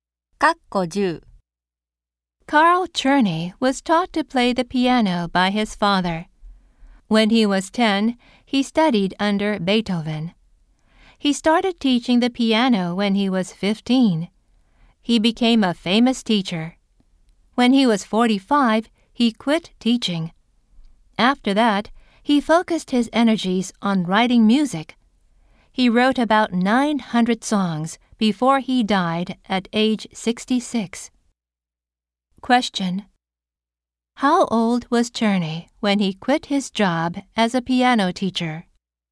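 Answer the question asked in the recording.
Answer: 45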